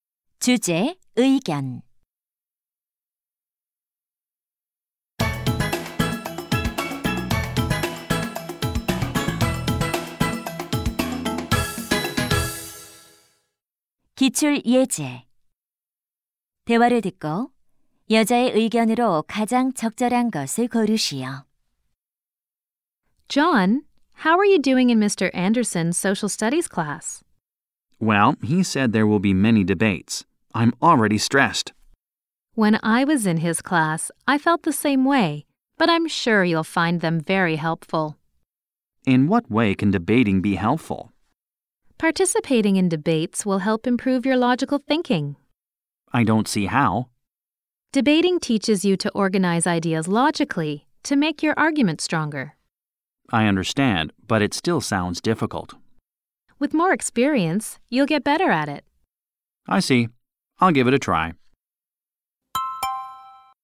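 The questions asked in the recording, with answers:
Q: 대화를 듣고 여자의 의견으로 가장 적절한 것을 고르시오.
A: 토론은 논리적 사고력 향상에 도움이 된다.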